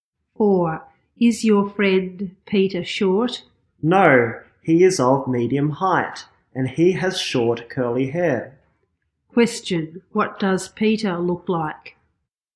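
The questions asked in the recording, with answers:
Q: Question, what does Peter look like?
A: He is of medium height with short curly hair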